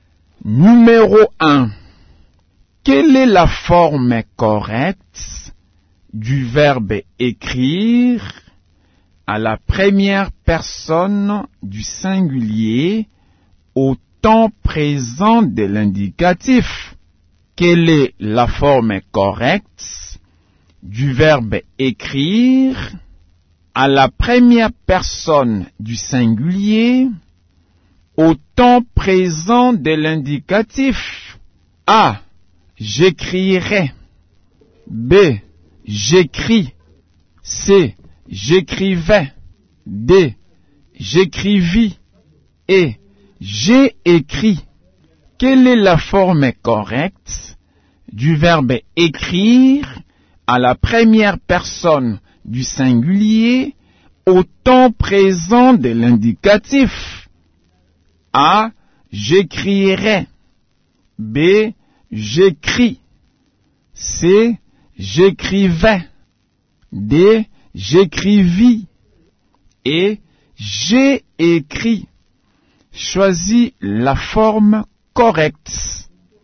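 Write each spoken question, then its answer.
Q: Quelle est la forme correcte du verbe écrire à la première personne du singulier au temps présent de l'indicatif?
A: B: J'écris.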